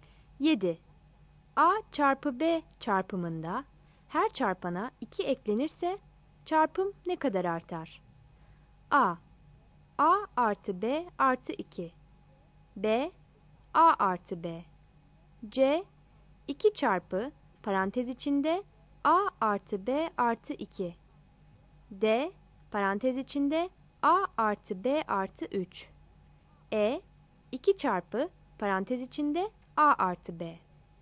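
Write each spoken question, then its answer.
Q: A çarpı B çarpımında her çarpana 2 eklenirse çarpım ne kadar artar?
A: C: 2 çarpı parantez içinde A artı B artı 2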